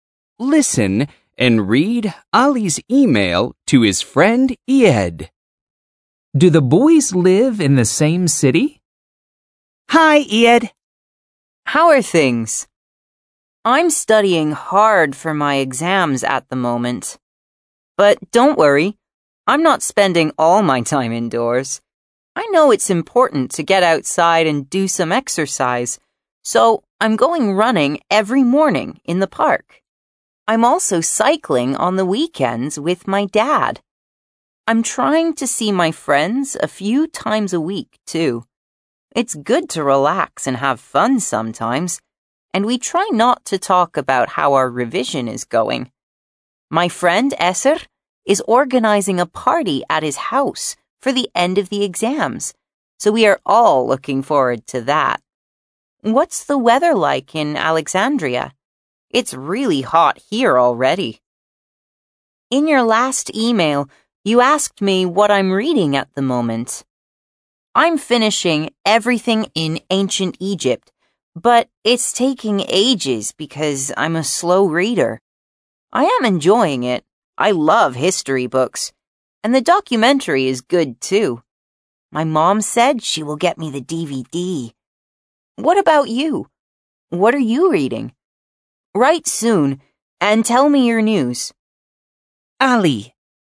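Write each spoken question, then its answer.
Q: Do the boys live in the same city?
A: No, Ied lives in Alexandria and Ali lives somewhere else.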